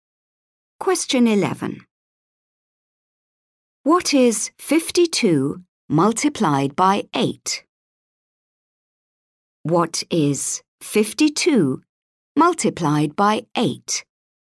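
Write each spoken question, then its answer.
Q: What is 52 multiplied by 8?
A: 416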